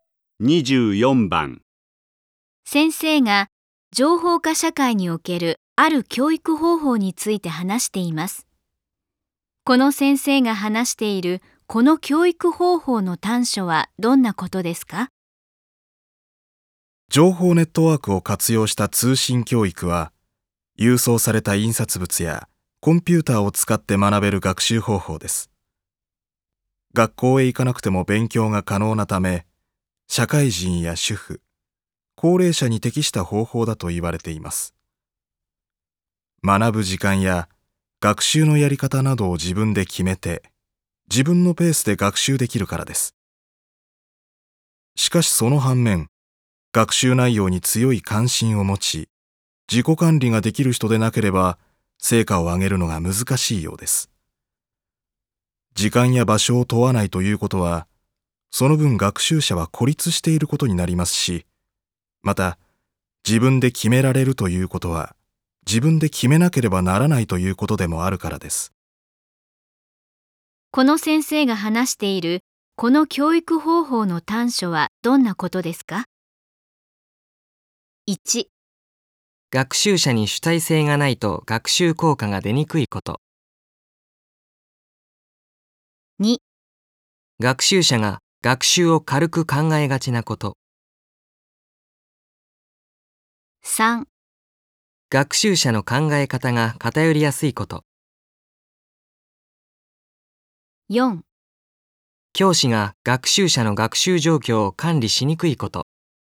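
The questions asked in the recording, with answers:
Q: この先生が話しているこの教育方法の短所はどんなことですか?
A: 1: 学習者に主体性がないと学習効果が出にくいこと。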